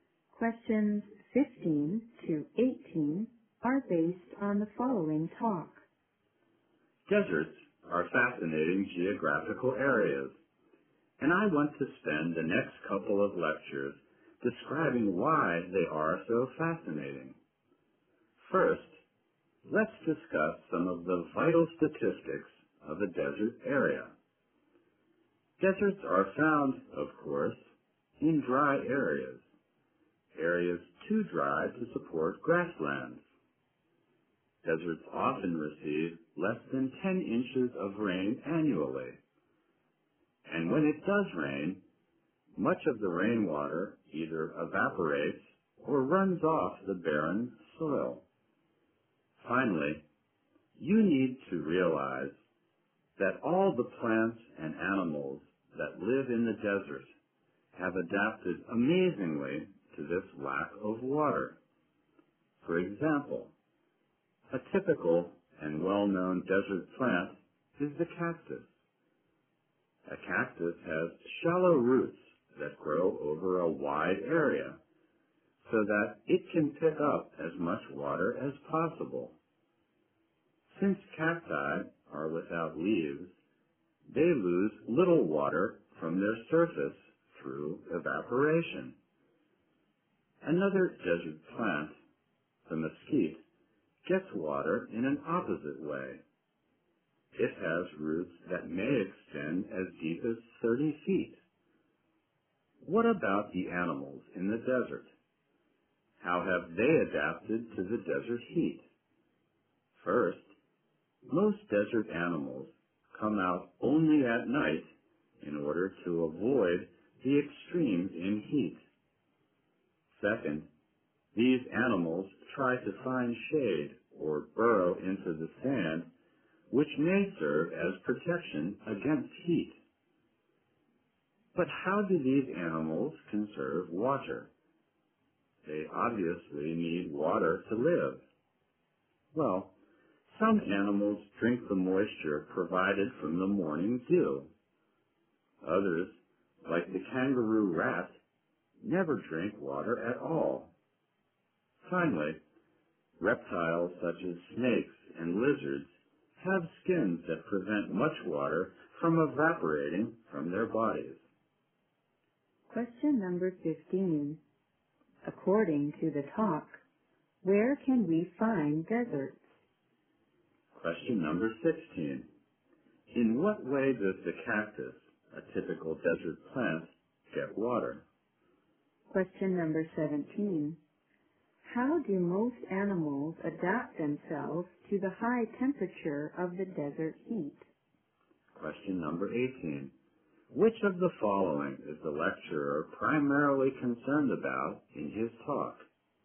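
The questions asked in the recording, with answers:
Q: According to the talk, where can we find deserts?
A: In dry areas, too dry to support grasslands

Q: In what way does the cactus, a typical desert plant, get water?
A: Its shallow roots grow over a wide area to pick up as much water as possible

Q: How do most animals adapt themselves to the high temperature of the desert heat?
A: They come out only at night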